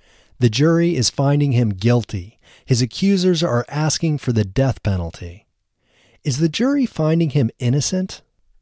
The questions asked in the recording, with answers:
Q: Is the jury finding him innocent?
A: No, the jury isn't finding him innocent.